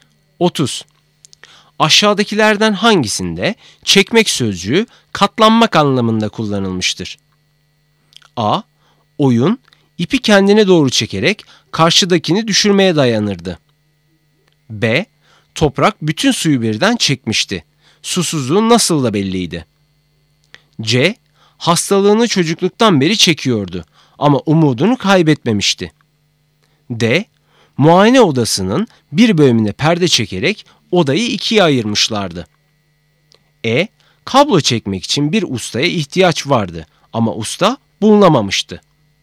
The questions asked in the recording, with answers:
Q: Aşağıdakilerden hangisinde çekmek sözcüğü katlanmak anlamında kullanılmıştır?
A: Doğru cevap C. Hastalığını çocukluktan beri çekiyordu ama umudunu kaybetmemişti.